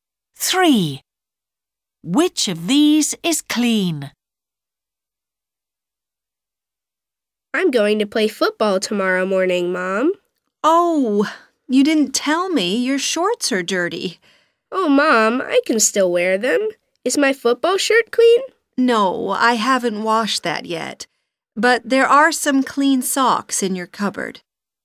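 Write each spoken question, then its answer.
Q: Which of these is clean?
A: socks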